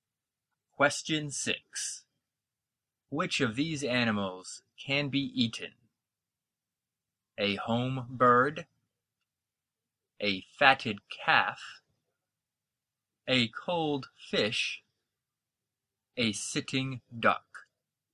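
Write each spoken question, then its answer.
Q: Which of these animals can be eaten?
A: B: a fatted calf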